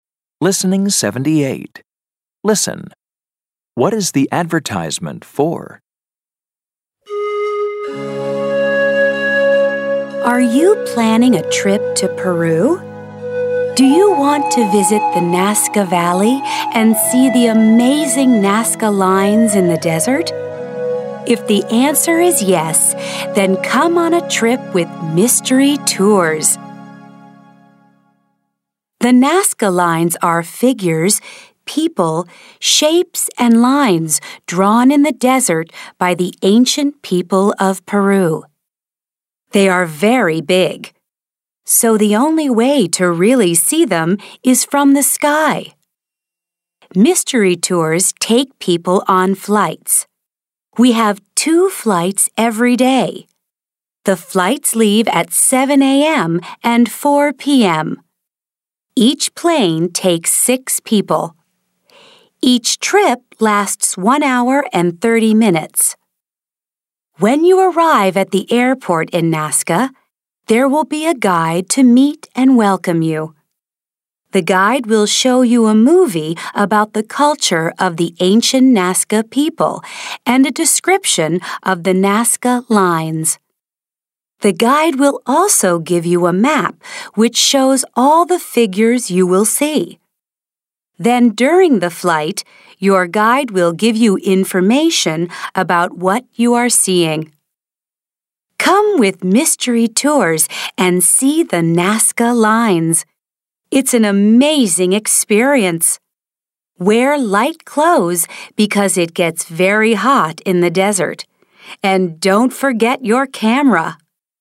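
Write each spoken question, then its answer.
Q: What is the advertisement for?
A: Flights over the Nazca lines in Peru with Mystery Tours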